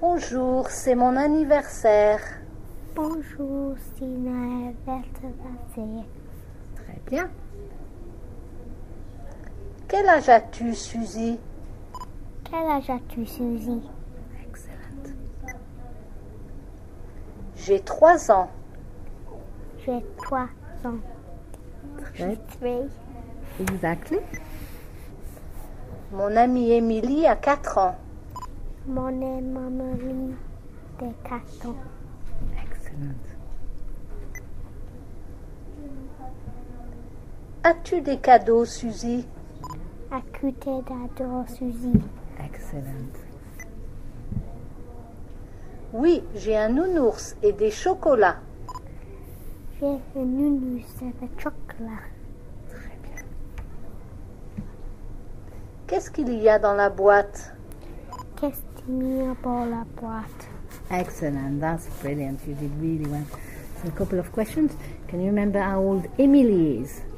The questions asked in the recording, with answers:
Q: Can you remember how old Emily is?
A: Mon amie Émilie a 4 ans.